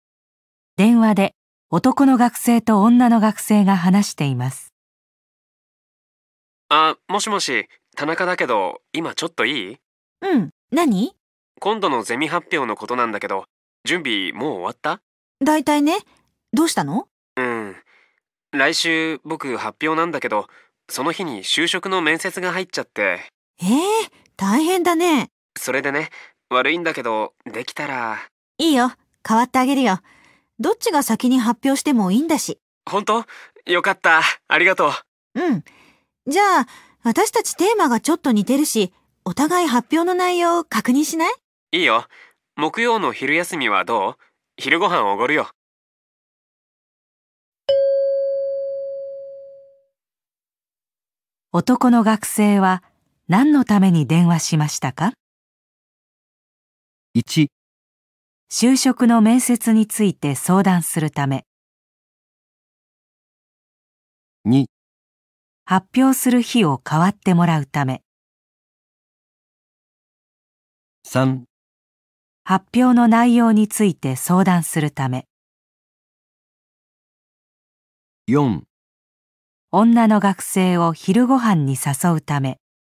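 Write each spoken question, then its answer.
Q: 男の学生は何のために電話しましたか?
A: 2: 発表する日を代わってもらうため。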